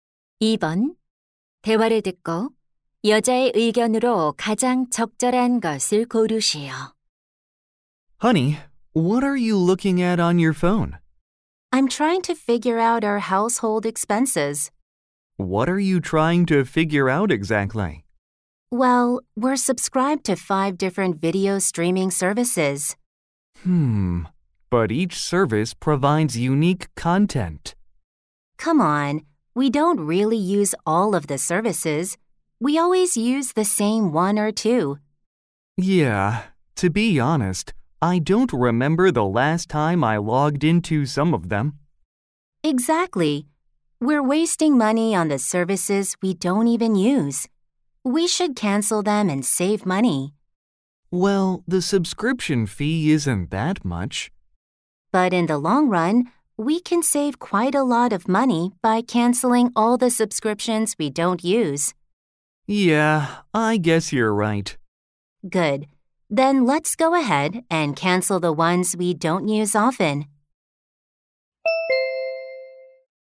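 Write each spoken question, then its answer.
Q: 대화를 듣고 여자의 의견으로 가장 적절한 것을 고르시오.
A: 사용하지 않는 구독 서비스는 해지해야 한다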